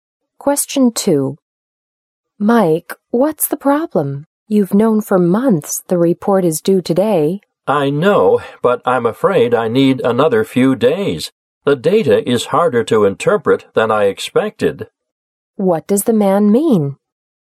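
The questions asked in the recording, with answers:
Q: What does the man mean?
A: He needs a few more days to finish the report.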